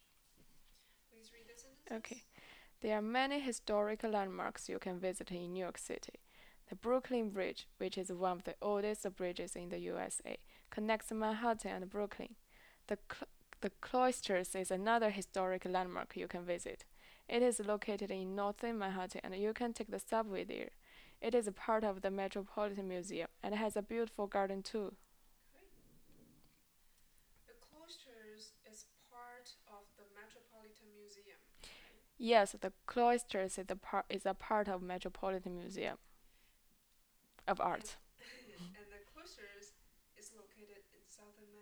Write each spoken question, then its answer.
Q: And the Cloisters is located in southern Manhattan.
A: No, the Cloisters is located in northern Manhattan.